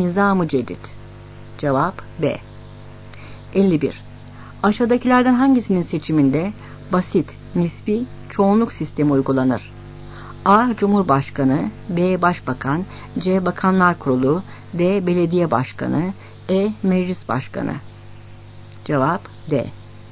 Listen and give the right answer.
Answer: Cevap D.